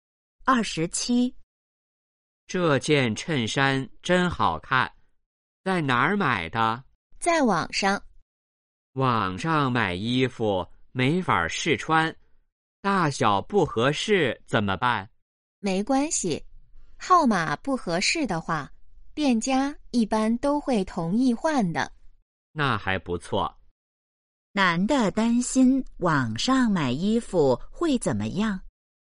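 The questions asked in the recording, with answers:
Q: 男的担心网上买衣服会怎么样?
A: 大小不合适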